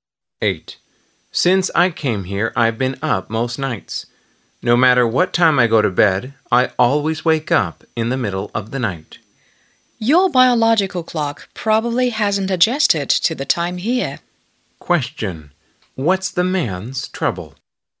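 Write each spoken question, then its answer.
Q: what's the man's trouble?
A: He can't sleep through the night.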